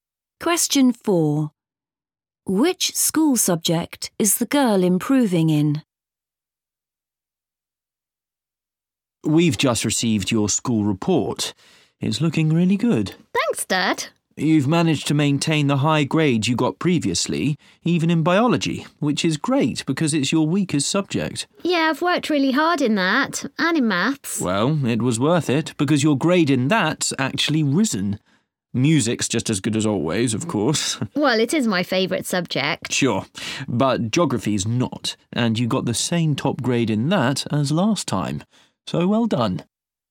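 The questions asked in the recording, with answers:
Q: Which school subject is the girl improving in?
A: Maths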